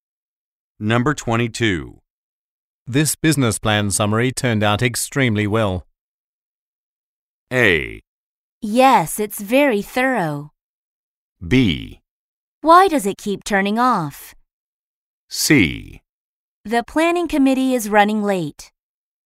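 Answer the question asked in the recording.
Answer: A: Yes, it's very thorough.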